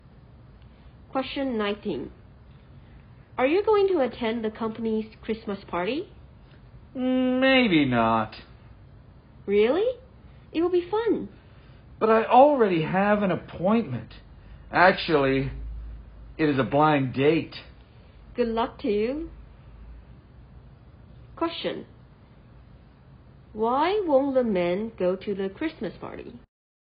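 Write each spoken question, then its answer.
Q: Why won't the men go to the Christmas party?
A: He already has an appointment, a blind date.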